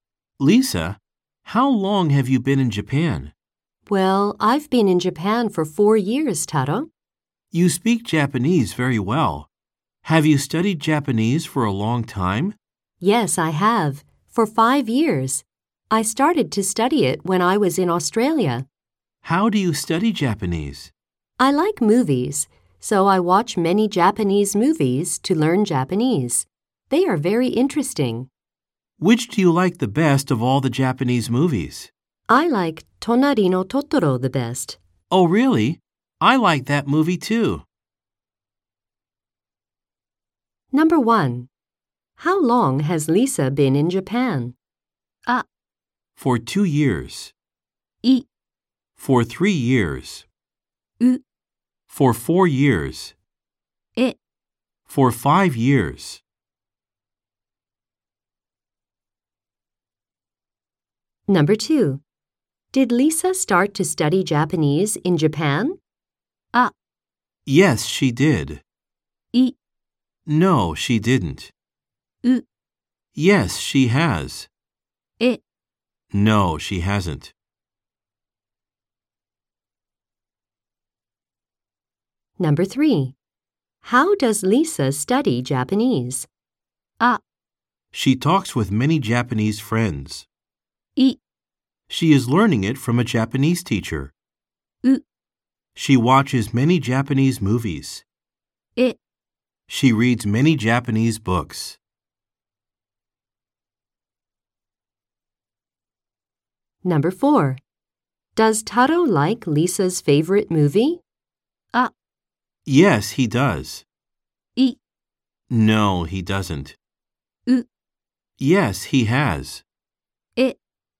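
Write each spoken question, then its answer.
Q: How long has Lisa been in Japan?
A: U: For 4 years.

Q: Did Lisa start to study Japanese in Japan?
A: I: No, she didn't.

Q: How does Lisa study Japanese?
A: U: She watches many Japanese movies.

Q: Does Taro like Lisa's favorite movie?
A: A: Yes, he does.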